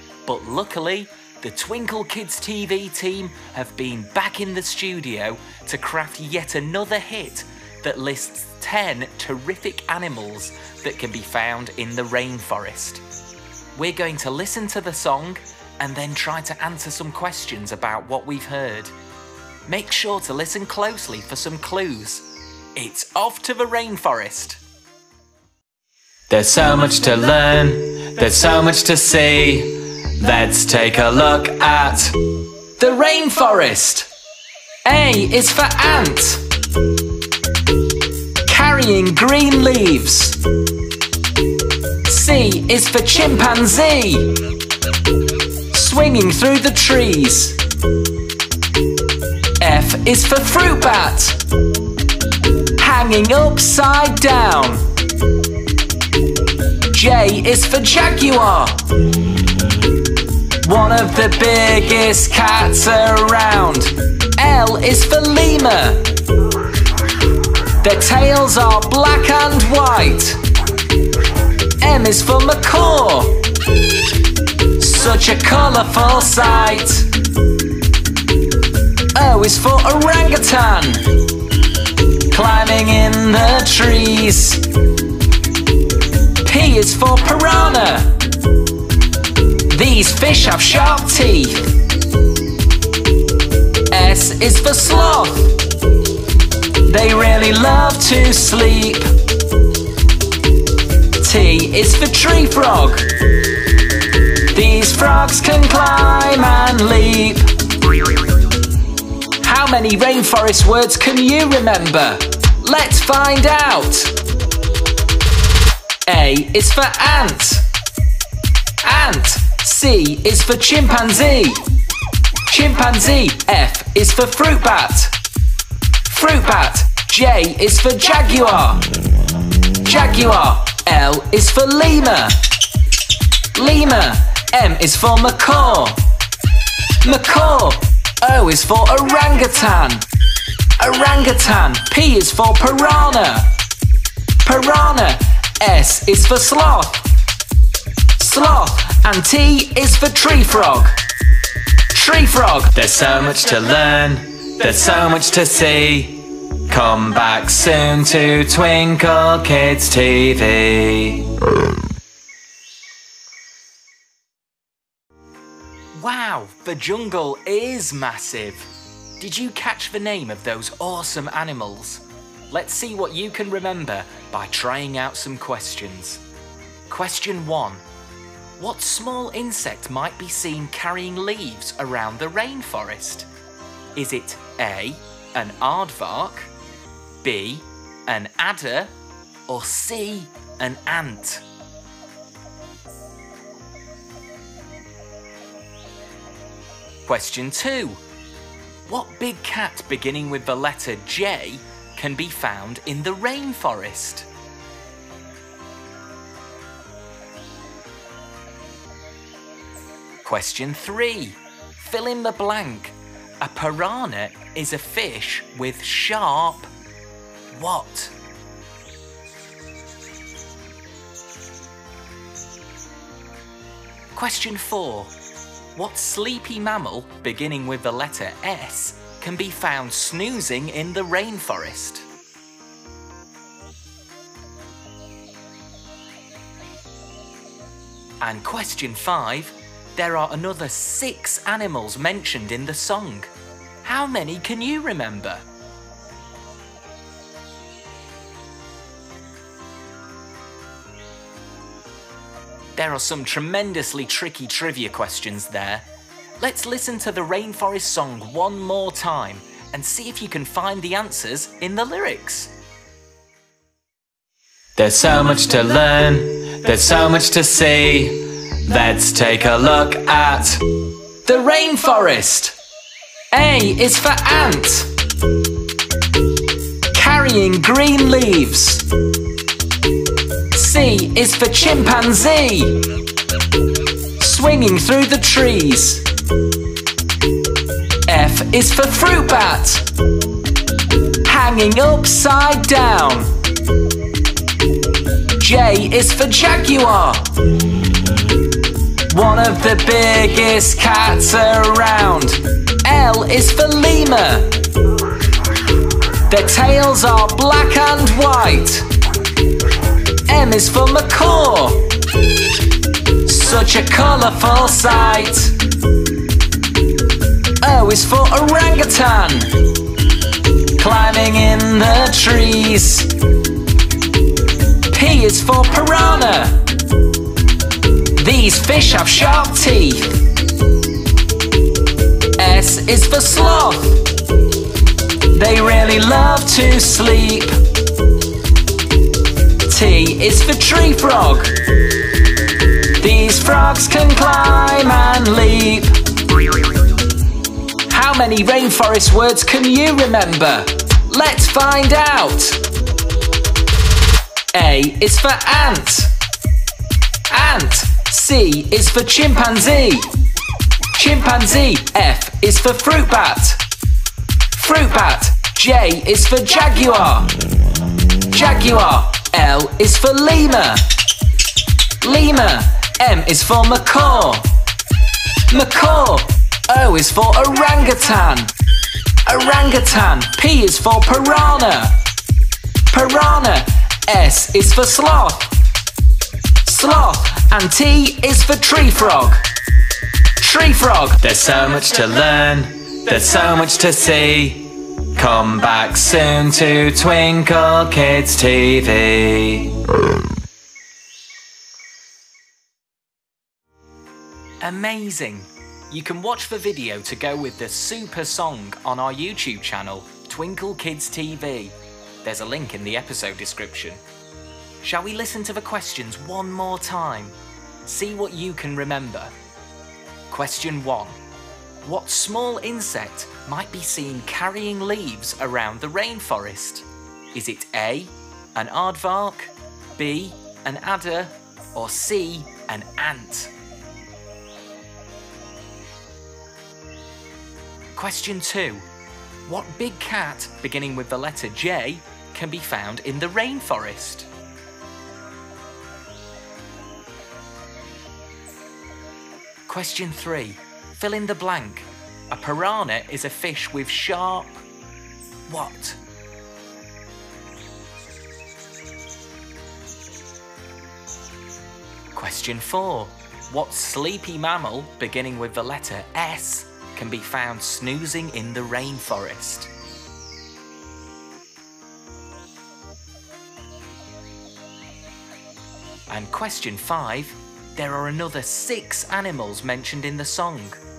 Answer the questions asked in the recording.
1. The answer is C, an ant.
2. The answer is a jaguar.
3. The answer is teeth.
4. The sleepy sloth is the answer.
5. the other animals in the song are chimpanzee, fruit bat, lemur, macaw, orangutan, and tree frog.